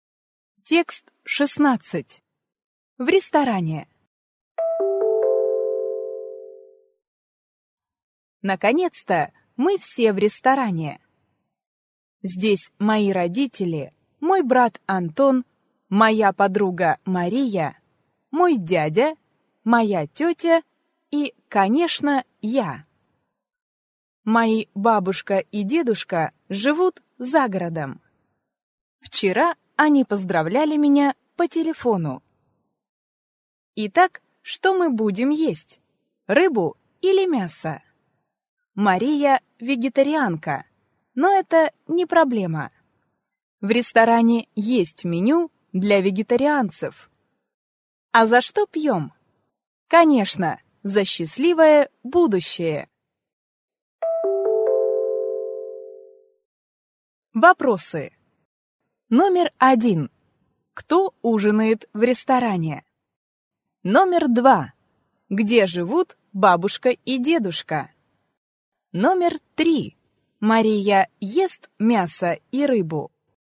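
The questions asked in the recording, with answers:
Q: Кто ужинает в ресторане?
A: Родители, брат Антон, подруга Мария, дядя, тетя и рассказчик

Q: Где живут бабушка и дедушка?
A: За городом

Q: Мария ест мясо и рыбу.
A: Нет, Мария вегетарианка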